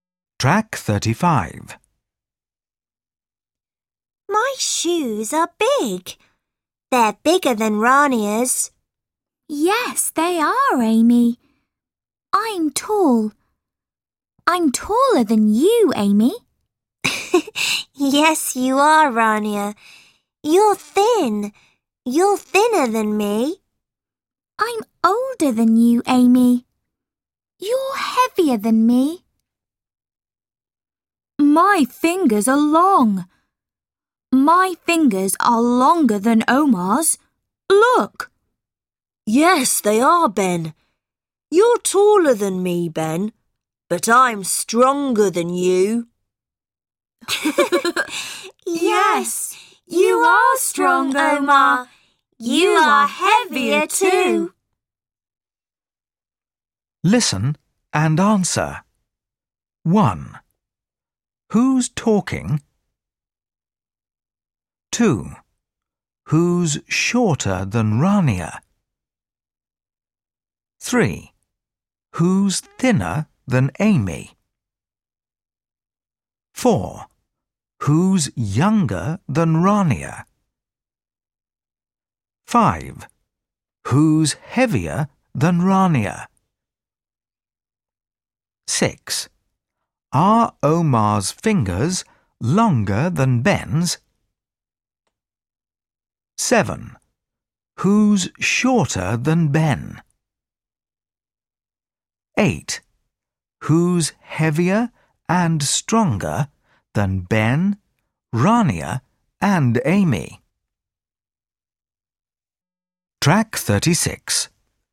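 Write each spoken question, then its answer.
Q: Who's talking?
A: Amy, Rania, Ben and Omar

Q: Who's shorter than Rania?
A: Amy

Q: Who's thinner than Amy?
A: Rania

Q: Who's younger than Rania?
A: Amy

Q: Who's heavier than Rania.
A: Amy

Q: Are Omar's fingers longer than Ben's?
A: No, Ben's fingers are longer

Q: Who's shorter than Ben?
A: Omar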